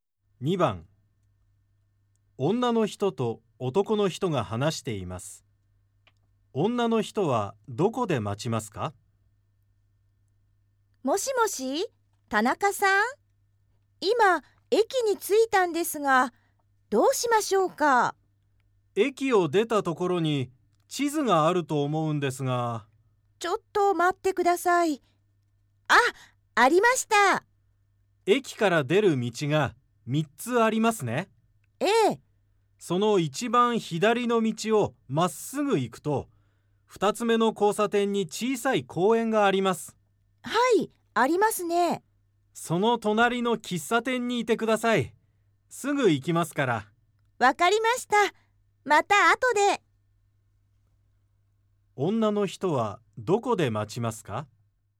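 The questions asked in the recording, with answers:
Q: 女の人はどこで待ちますか?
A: 公園の隣の喫茶店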